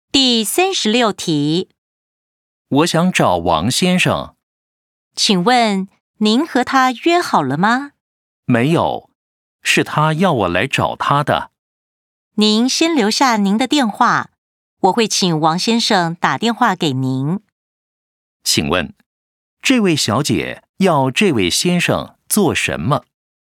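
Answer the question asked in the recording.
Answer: 留下他的电话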